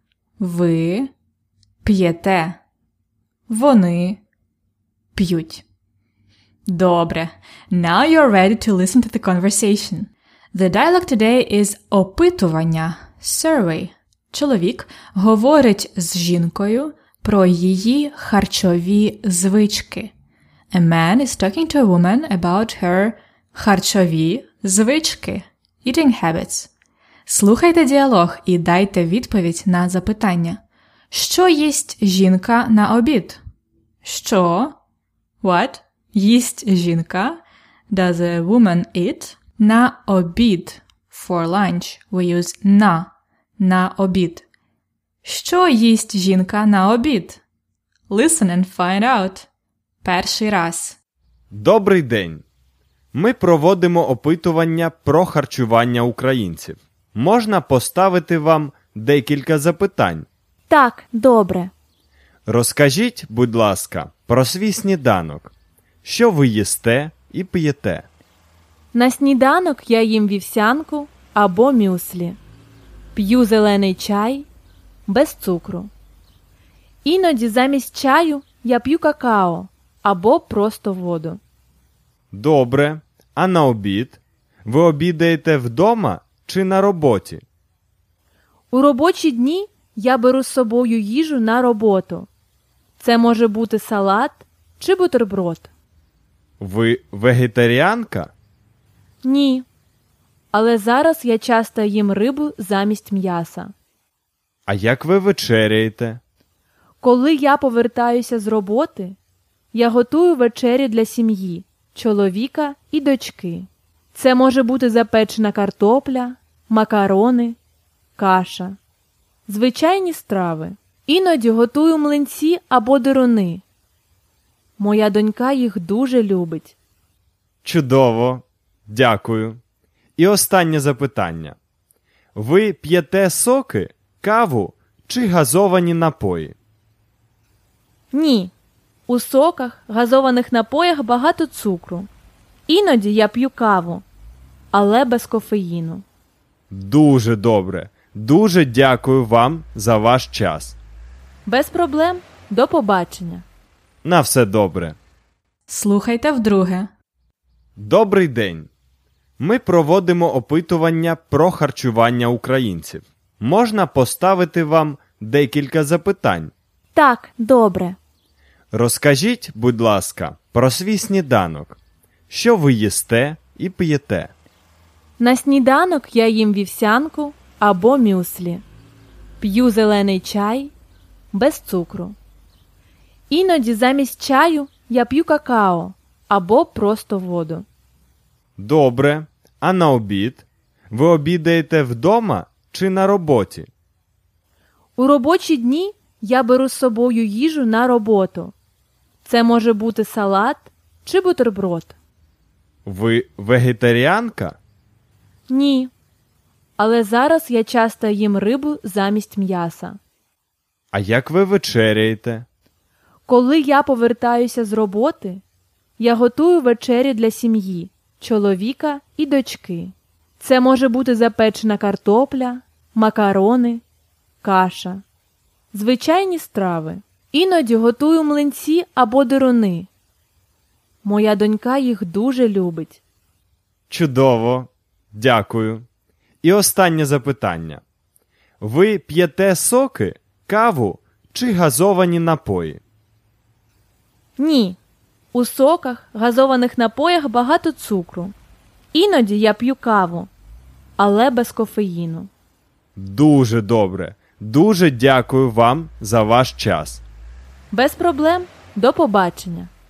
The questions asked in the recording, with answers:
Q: Що їсть жінка на обід?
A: Вона їсть салат або бутерброд.